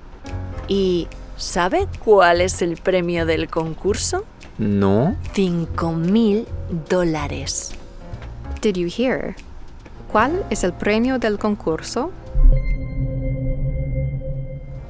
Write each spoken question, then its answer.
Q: ¿Cuál es el premio del concurso?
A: Right. It's $5,000. $5,000.